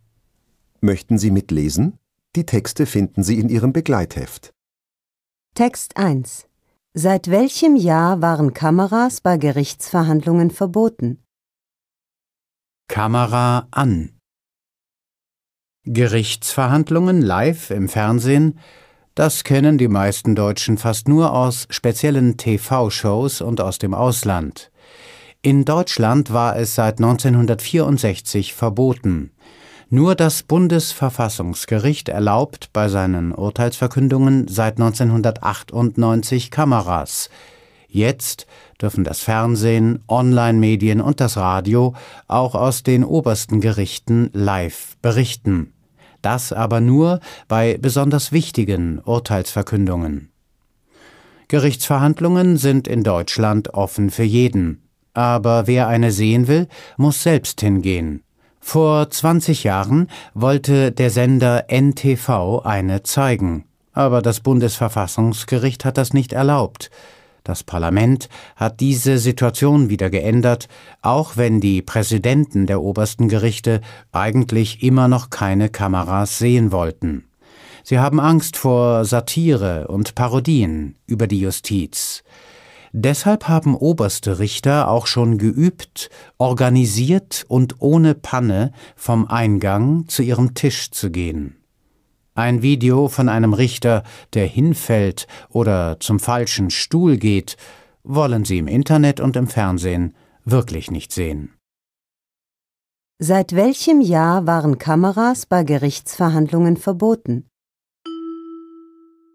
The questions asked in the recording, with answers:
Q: Seit welchem Jahr waren Kameras bei Gerichtsverhandlungen verboten?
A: Seit dem Jahr 1964.